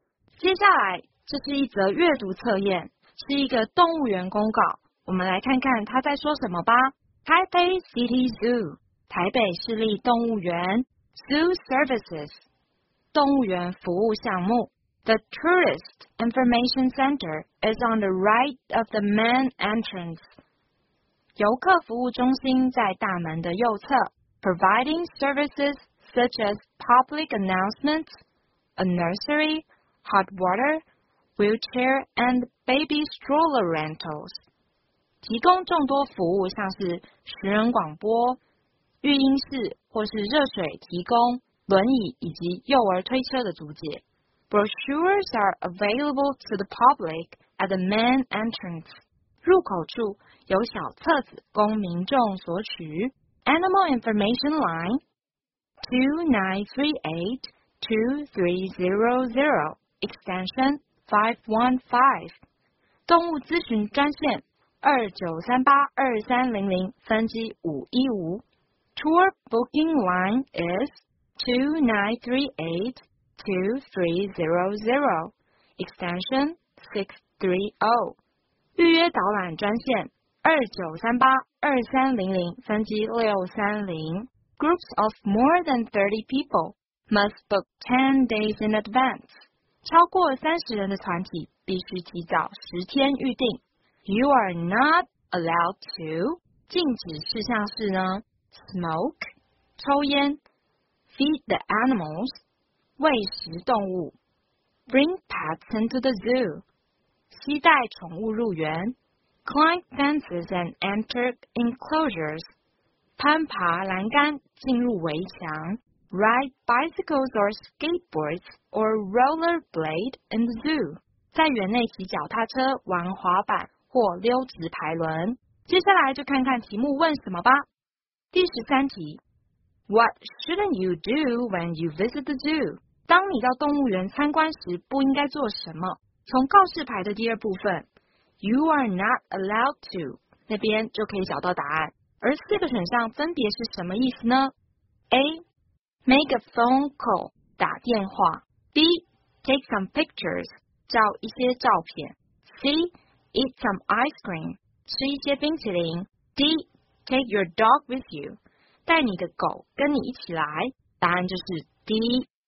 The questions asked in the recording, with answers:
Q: What shouldn't you do when you visit the zoo?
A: 答案就是 D